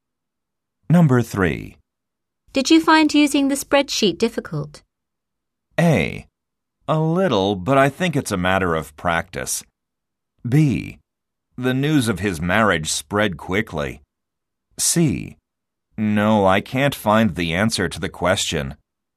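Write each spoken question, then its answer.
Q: Did you find using the spreadsheet difficult?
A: A: A little, but I think it's a matter of practice.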